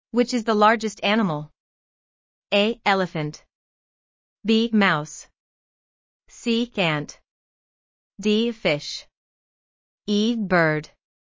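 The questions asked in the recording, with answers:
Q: Which is the largest animal?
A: A: Elephant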